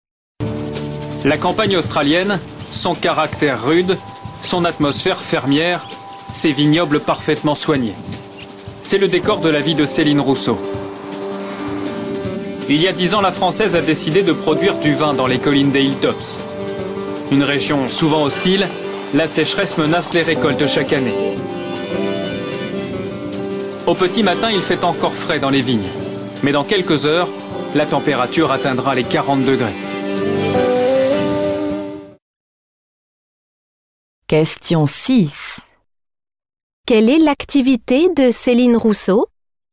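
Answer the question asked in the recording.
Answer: Elle produit du vin en Australie (viticultrice)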